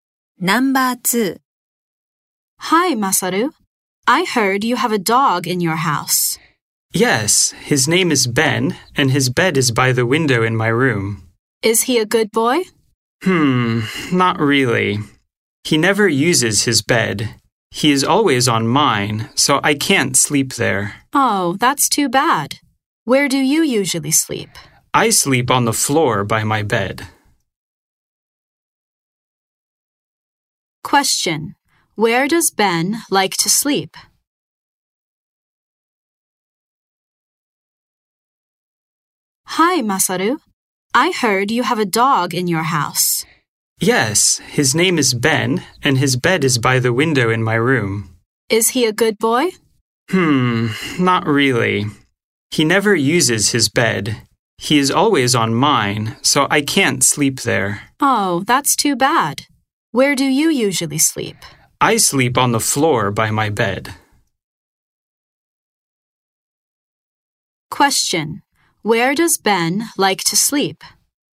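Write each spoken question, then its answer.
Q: Where does Ben like to sleep?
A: On Masaru's bed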